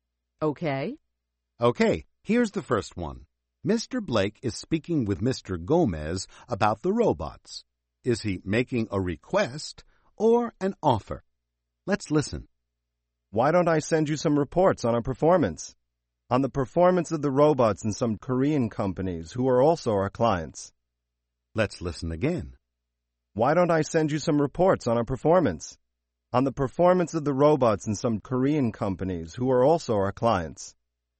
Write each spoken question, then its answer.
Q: Is he making a request or an offer?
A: That's right. He's making an offer.